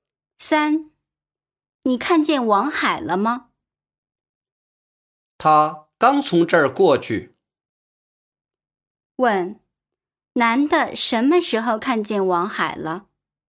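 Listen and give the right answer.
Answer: 刚才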